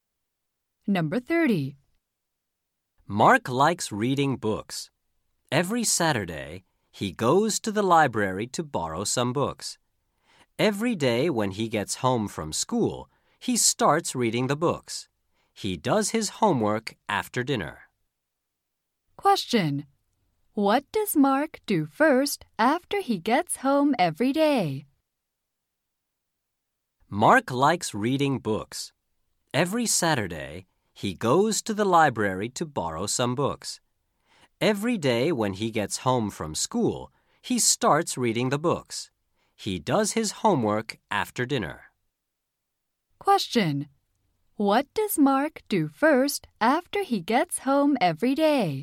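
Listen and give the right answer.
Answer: He reads books.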